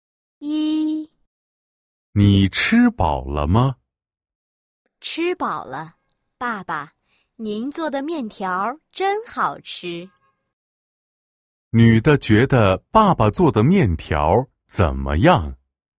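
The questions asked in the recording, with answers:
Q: 女的觉得爸爸做的面条怎么样?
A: 很好吃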